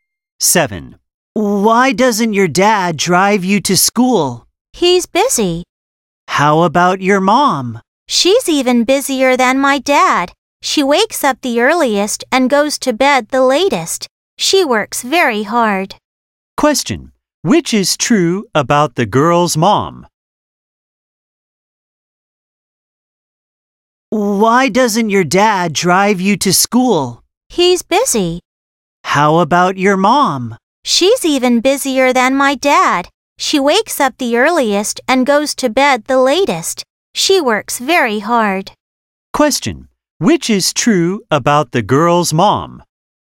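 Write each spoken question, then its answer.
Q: Which is true about the girl's mom?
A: She is busier than the dad; she gets up earliest and goes to bed latest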